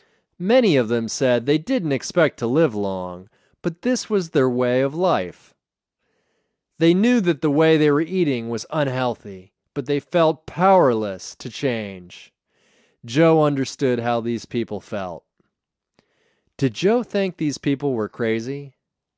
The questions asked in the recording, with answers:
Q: Did Joe think these people were crazy?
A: No, he didn't think these people were crazy.